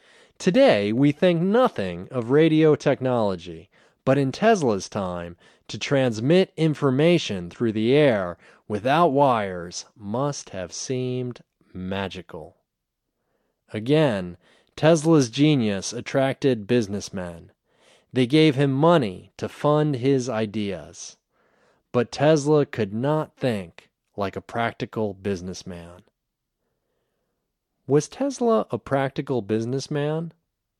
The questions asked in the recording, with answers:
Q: Was Tesla a practical businessman?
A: No, he wasn't a practical businessman.